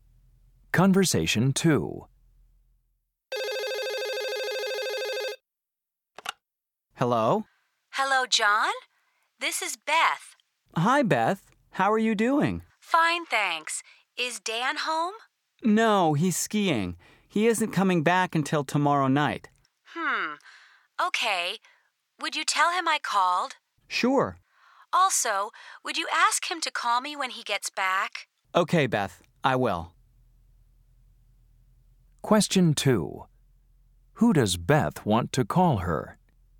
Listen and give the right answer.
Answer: I'll have Dan call you tomorrow evening.